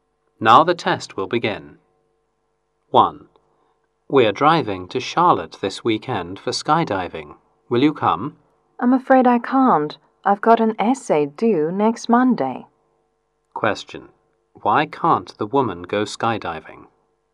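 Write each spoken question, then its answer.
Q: Why can't the woman go skydiving?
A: She has an essay due next Monday.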